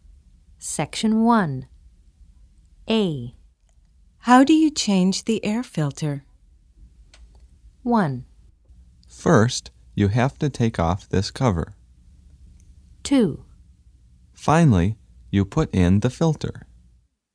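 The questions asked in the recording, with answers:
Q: How do you change the air filter?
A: 1: First, you have to take off this cover.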